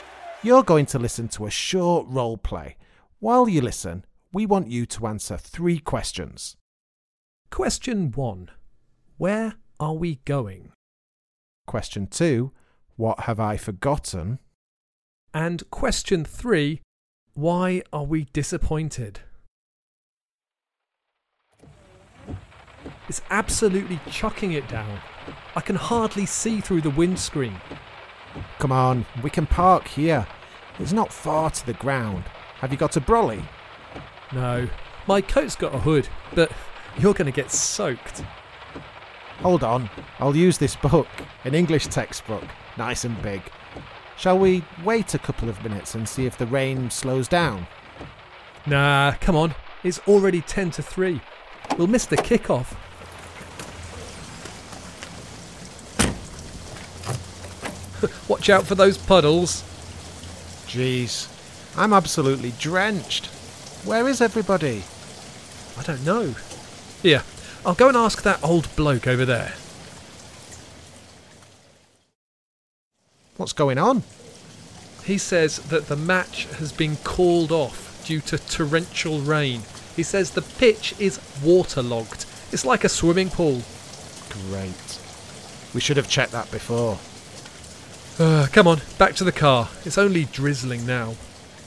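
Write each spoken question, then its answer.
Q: where are we going?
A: To a football match (the ground)

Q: what have I forgotten?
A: you might remember that I didn't have a brolly

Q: why are we disappointed?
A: The match was called off because heavy rain left the pitch waterlogged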